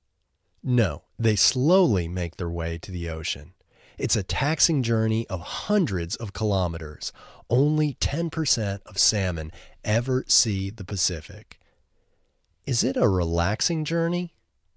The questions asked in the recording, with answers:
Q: Is it a relaxing journey?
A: No, it's not a relaxing journey.